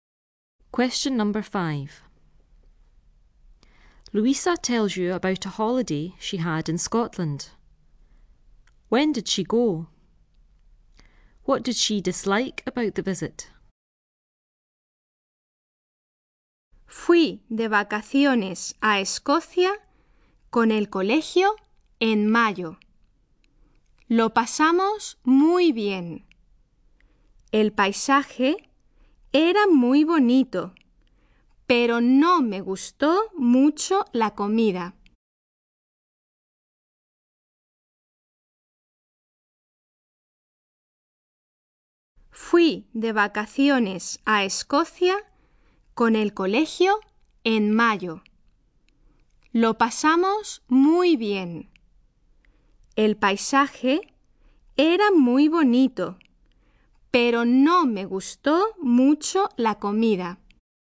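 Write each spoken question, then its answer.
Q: When did she go?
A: In May

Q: What did she dislike about the visit?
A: The food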